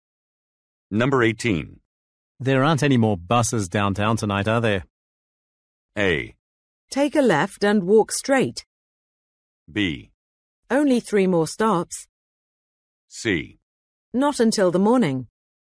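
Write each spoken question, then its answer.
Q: There aren't any more buses downtown tonight, are there?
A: C: Not until the morning.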